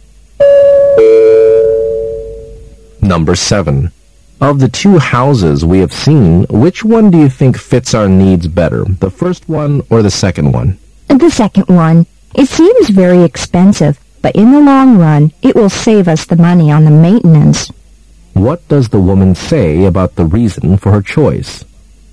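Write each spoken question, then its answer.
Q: What does the woman say about the reason for her choice?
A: The second house will save them money on maintenance in the long run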